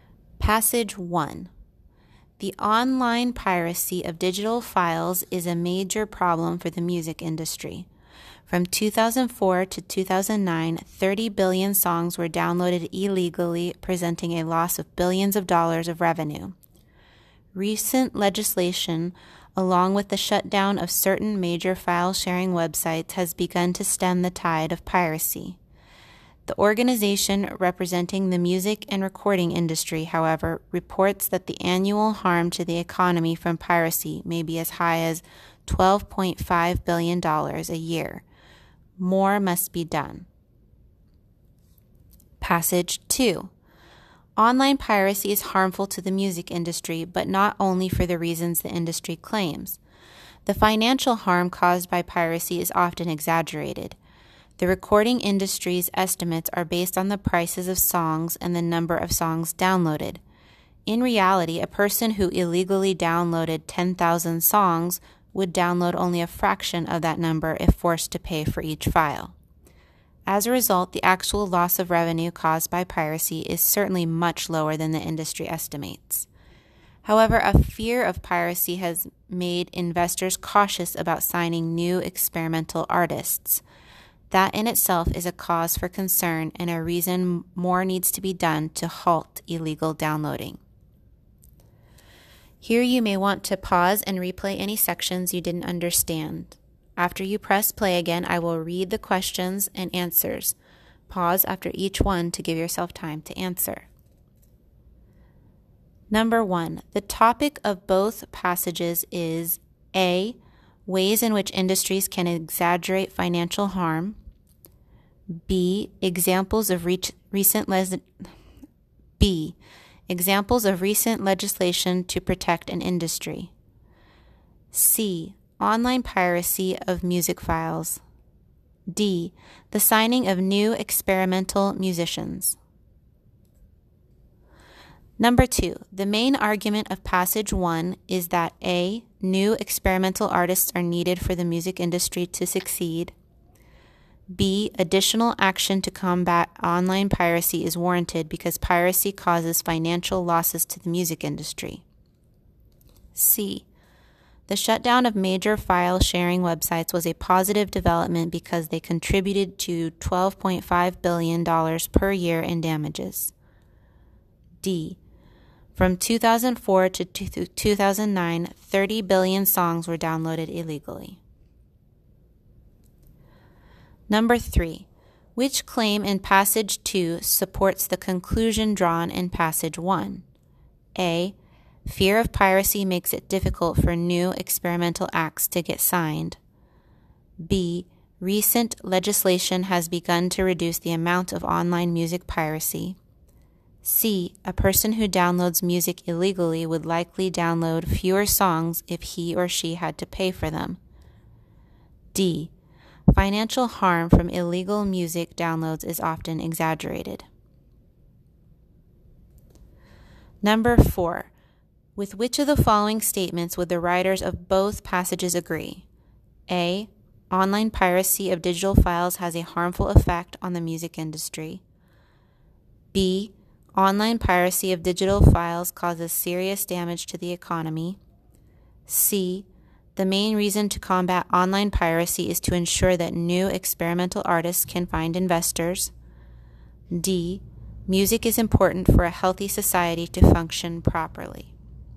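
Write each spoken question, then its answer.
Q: The topic of both passages is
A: C: Online piracy of music files.

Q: The main argument of passage 1 is that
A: B: Additional action to combat online piracy is warranted because piracy causes financial losses to the music industry.

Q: Which claim in passage 2 supports the conclusion drawn in passage 1?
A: A: Fear of piracy makes it difficult for new experimental acts to get signed.

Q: With which of the following statements would the writers of both passages agree?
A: A: Online piracy of digital files has a harmful effect on the music industry.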